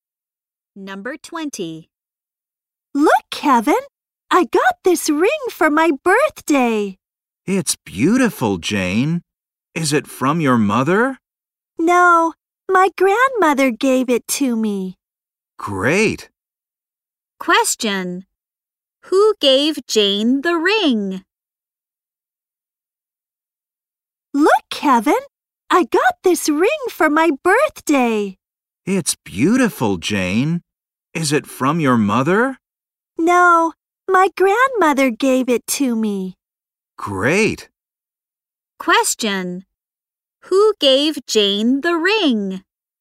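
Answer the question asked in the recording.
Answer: Her grandmother.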